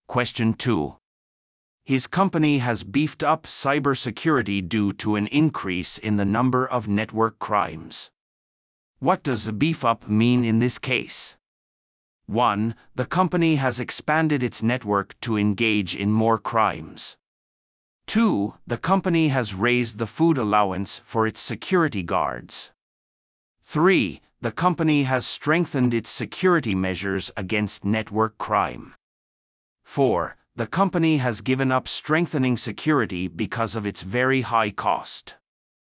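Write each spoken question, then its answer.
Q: What does a beef up mean in this case?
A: 3: The company has strengthened its security measures against network crime.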